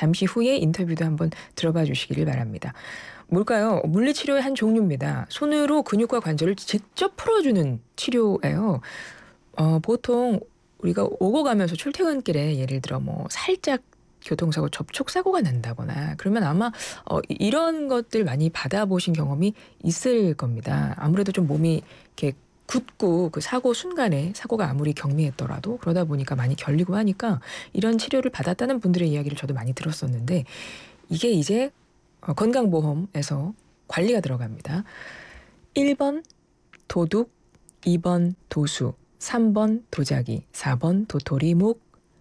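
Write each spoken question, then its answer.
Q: 뭘까요? 물리치료의 한 종류입니다. 손으로 근육과 관절을 직접 풀어주는 치료예요.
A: 2번: 도수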